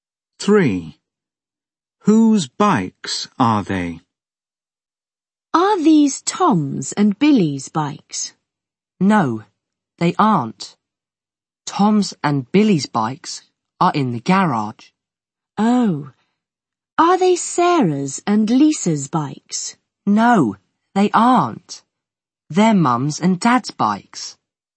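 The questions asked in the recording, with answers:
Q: Whose bikes are they?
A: Mum's and Dad's bikes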